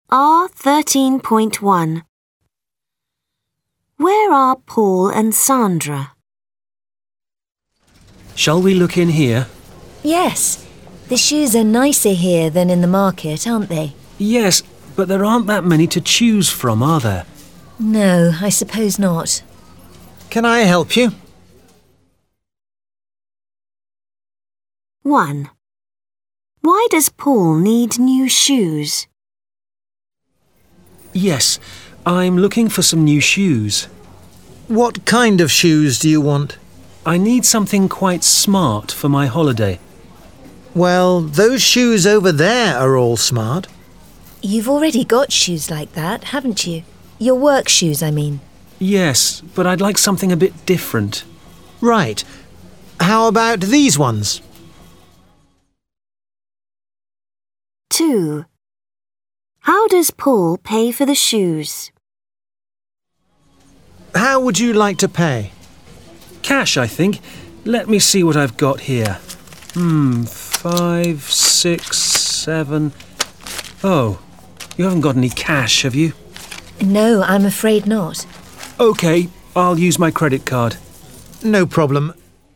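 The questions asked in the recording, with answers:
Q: Where are Paul and Sandra?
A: In a shoe shop

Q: Why does Paul need new shoes?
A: He needs smart shoes for his holiday

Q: How does Paul pay for the shoes?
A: By credit card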